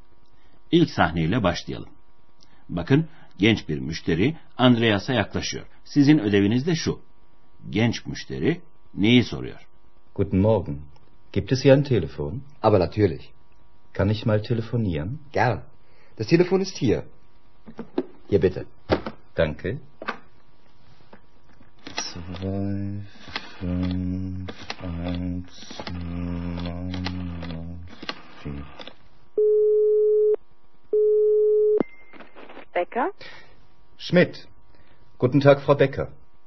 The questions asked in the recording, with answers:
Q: Genç müşteri neyi soruyor?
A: Genç adamın telefonu sorduğunu anlamanız hiç de zor olmadı sanırım sevgili dinleyenler.